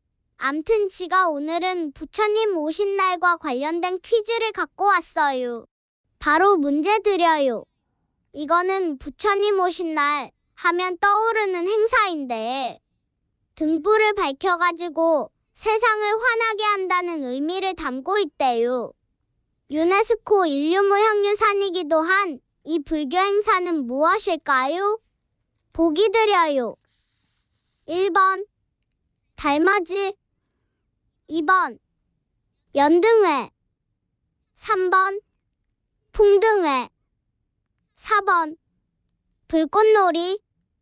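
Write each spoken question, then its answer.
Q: 유네스코 인류무형유산이기도 한 이 불교 행사는 무엇일까요?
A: 2번: 연등회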